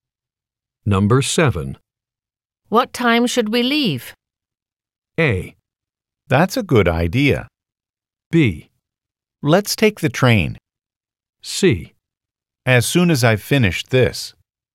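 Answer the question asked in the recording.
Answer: C: As soon as I've finished this.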